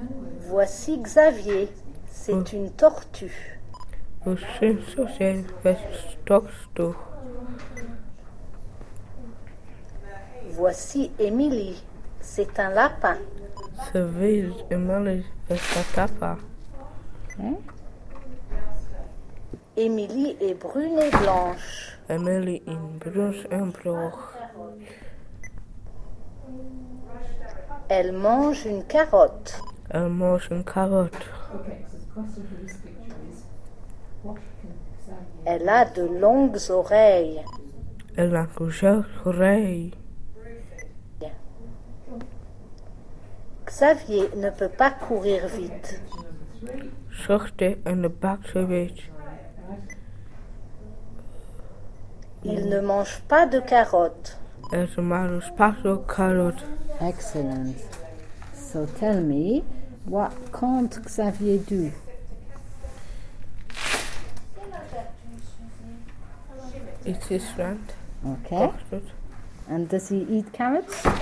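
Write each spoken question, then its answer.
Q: So tell me, what can't Xavier do?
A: Run fast

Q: And does he eat carrots?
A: No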